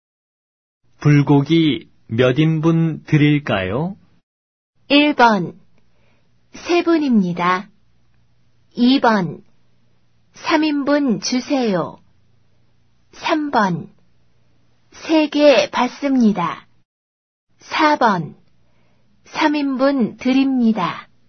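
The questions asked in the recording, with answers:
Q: 불고기 몇 인분 드릴까요?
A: 2: 3인분 주세요.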